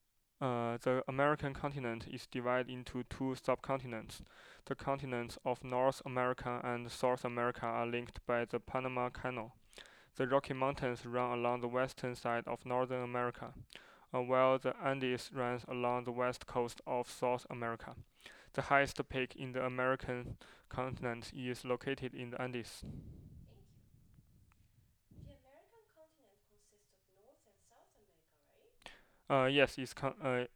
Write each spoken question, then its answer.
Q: The American continent consists of North and South America, right?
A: Yes, it contains South and North America.